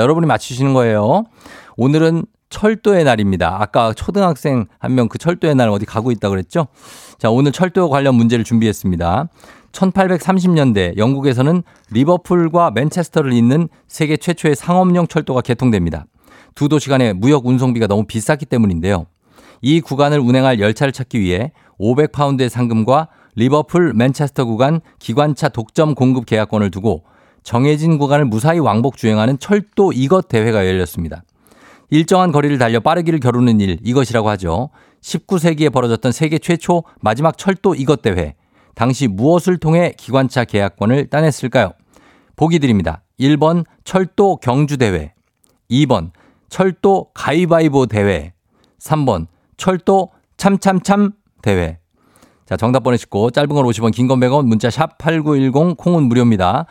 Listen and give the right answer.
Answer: 정답은 바로 경주입니다. 경주. 철도 경주 대회.